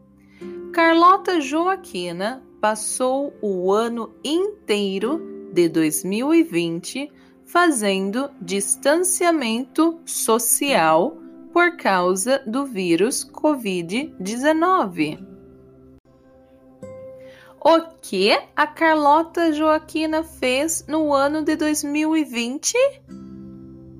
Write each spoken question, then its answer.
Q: O que a Carlota Joaquina fez no ano de 2020?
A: Ela fez distanciamento social no ano de 2020.